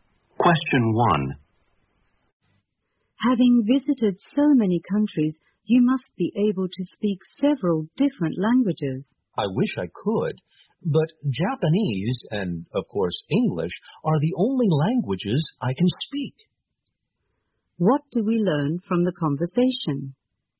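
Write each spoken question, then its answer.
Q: What do we learn from the conversation?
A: The woman can speak only two languages, Japanese and English.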